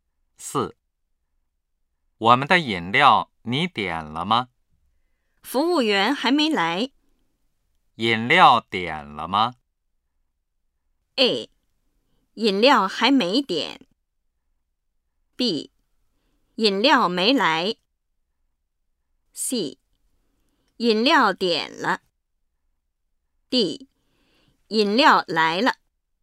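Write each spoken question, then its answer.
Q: 饮料点了吗?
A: A: 饮料还没点。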